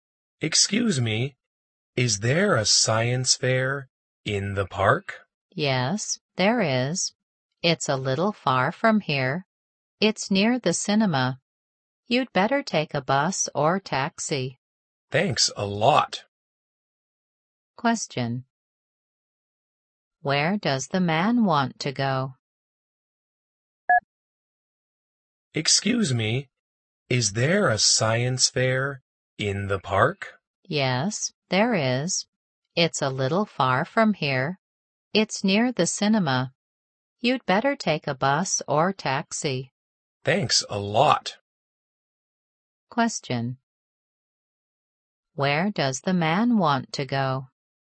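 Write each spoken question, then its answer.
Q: Where does the man want to go?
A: The science fair in the park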